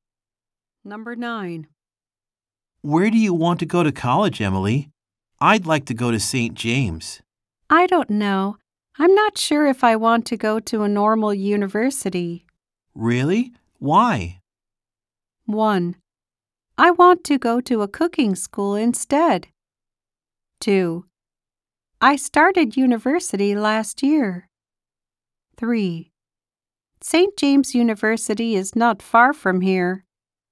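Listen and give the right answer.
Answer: 1: I want to go to a cooking school instead.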